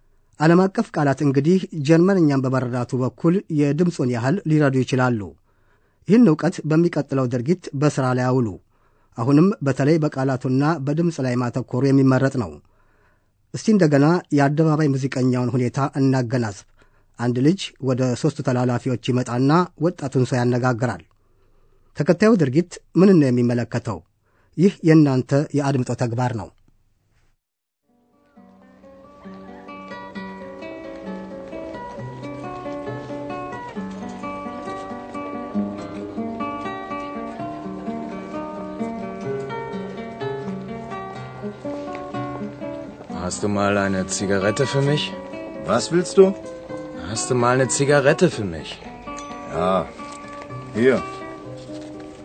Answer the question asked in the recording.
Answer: አንድ ወጣት ሲጋራ ይጠይቃል።